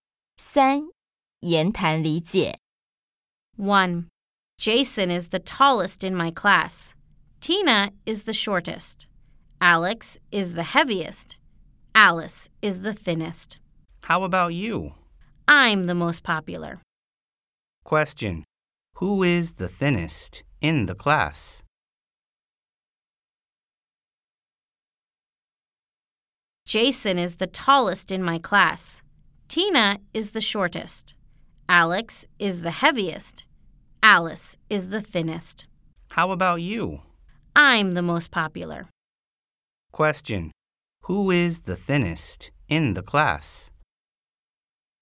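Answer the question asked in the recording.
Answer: Alice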